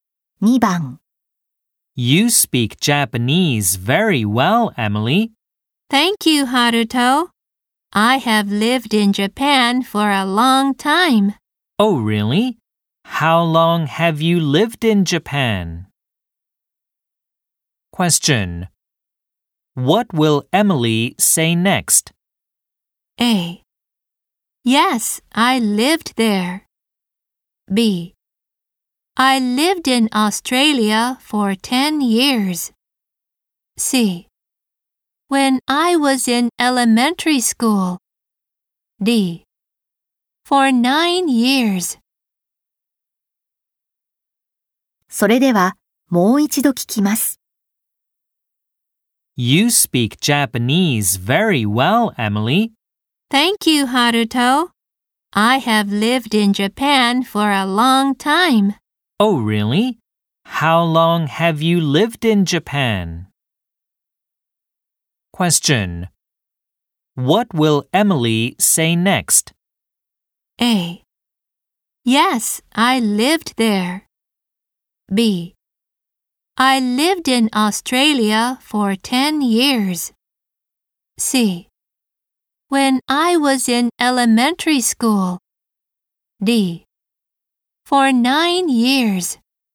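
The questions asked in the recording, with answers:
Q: What will Emily say next?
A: D: For 9 years.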